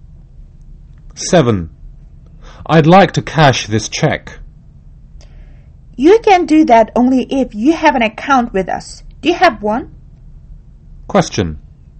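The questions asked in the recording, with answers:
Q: What does the man want?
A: To cash a check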